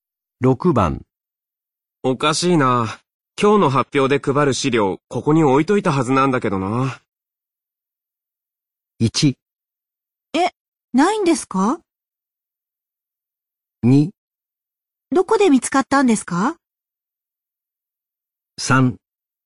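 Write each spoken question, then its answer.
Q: おかしいな。今日の発表で配る資料、ここに置いといたはずなんだけどな。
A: 1: え、ないんですか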